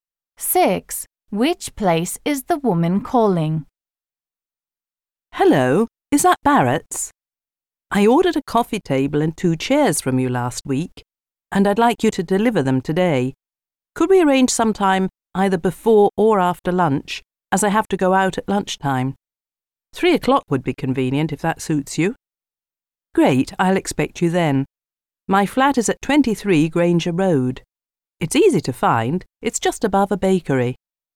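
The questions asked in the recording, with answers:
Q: Which place is the woman calling?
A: A furniture shop (Barrett's)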